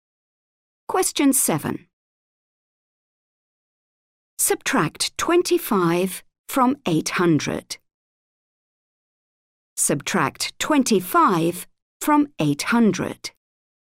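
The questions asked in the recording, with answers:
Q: Subtract 25 from 800.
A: 775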